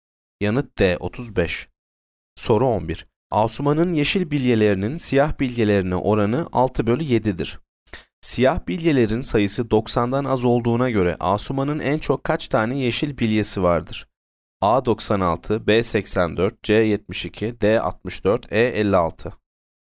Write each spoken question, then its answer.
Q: Siyah bilyelerin sayısı 90'dan az olduğuna göre Asuman'ın en çok kaç tane yeşil bilyesi vardır?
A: Yanıt C 72.